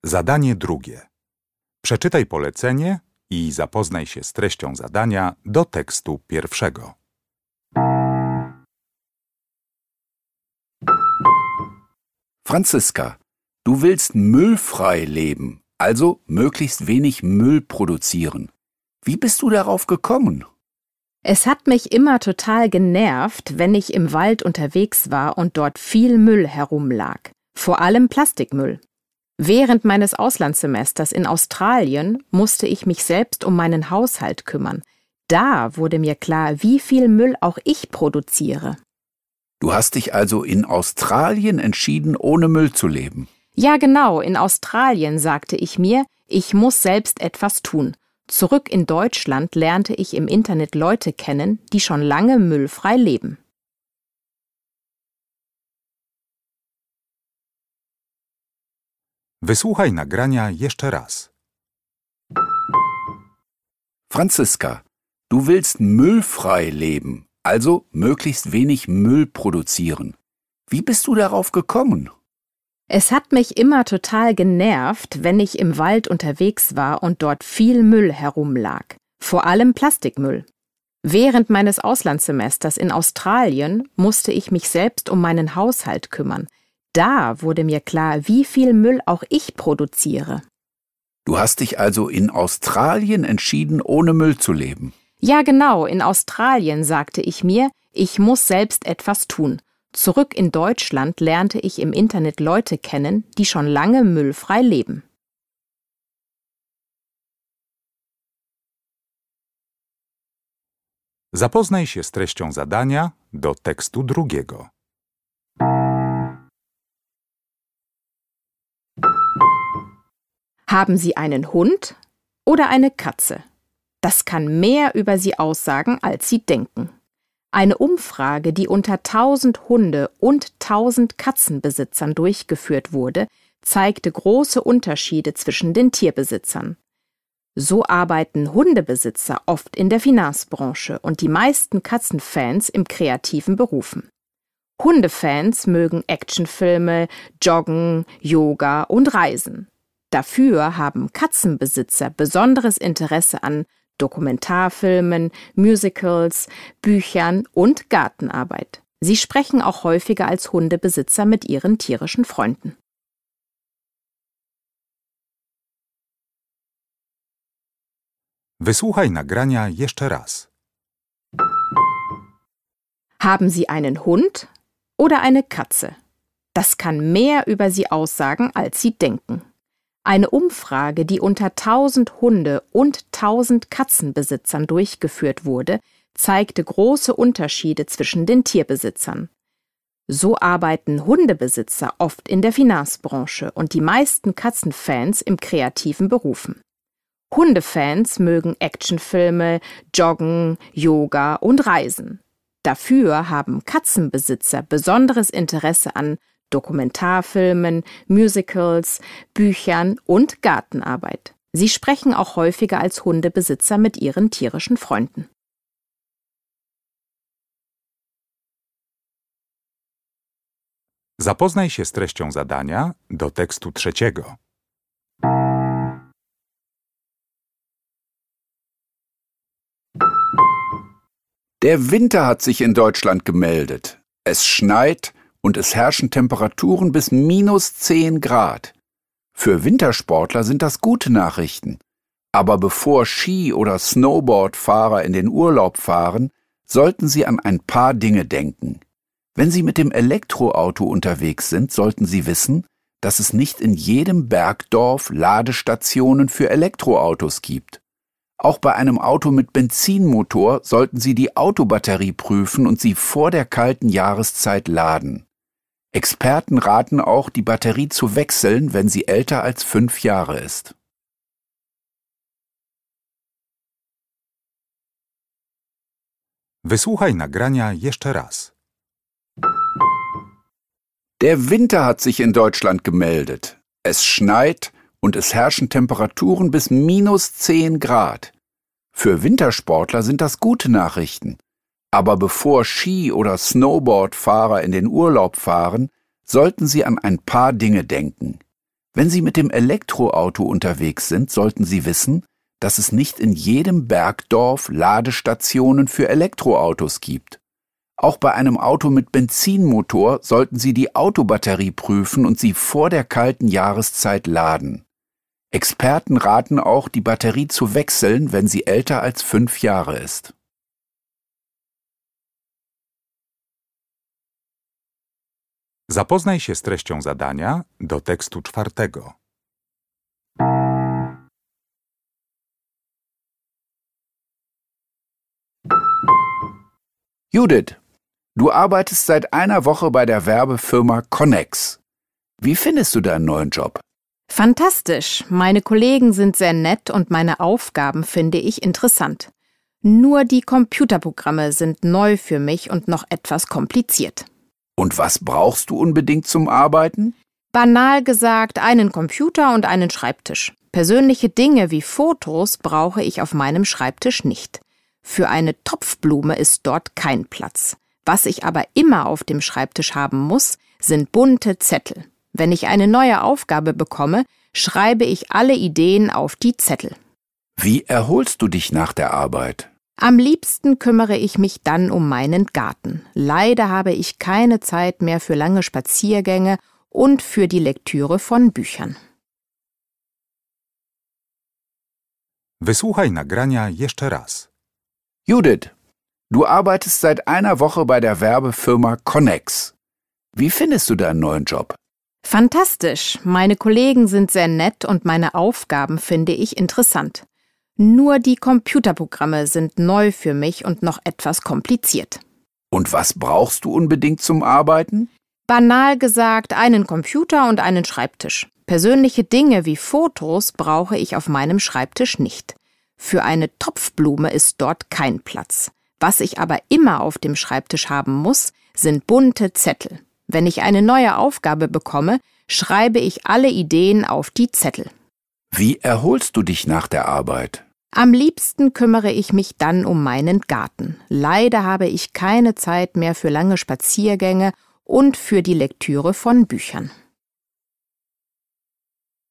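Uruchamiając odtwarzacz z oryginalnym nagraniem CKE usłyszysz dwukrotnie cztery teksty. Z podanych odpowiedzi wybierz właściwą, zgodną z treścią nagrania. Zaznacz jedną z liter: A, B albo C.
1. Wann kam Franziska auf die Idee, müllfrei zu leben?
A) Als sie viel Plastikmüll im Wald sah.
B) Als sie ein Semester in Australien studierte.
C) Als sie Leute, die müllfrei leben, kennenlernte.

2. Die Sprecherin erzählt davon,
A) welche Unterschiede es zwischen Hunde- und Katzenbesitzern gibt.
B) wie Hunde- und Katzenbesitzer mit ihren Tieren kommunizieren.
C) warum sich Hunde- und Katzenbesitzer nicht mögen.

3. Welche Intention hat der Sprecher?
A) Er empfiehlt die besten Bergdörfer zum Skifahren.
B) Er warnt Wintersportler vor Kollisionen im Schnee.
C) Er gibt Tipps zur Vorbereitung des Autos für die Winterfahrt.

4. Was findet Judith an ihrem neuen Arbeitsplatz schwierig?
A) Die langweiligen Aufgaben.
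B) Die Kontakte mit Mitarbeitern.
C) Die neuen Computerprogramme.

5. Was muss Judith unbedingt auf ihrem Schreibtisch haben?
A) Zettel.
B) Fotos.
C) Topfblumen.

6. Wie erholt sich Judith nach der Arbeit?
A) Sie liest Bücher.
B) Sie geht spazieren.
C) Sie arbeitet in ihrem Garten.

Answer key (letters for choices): 1B, 2A, 3C, 4C, 5A, 6C

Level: Poziom: podstawowy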